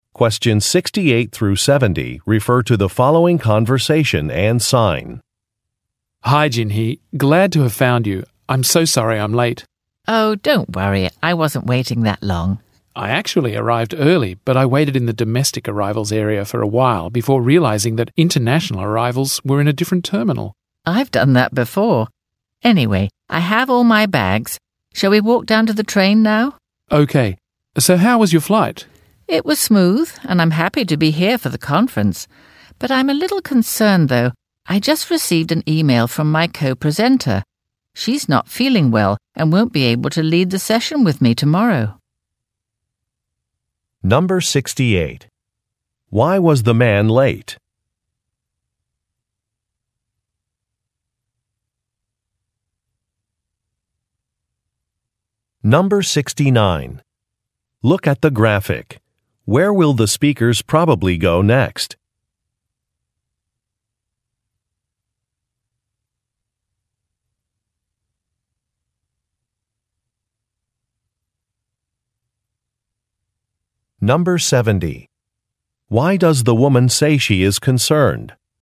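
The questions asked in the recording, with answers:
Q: Why was the man late?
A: He waited in the wrong terminal (domestic arrivals instead of international arrivals).

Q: Why does the woman say she is concerned?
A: Her co-presenter is sick and can't lead the session with her tomorrow.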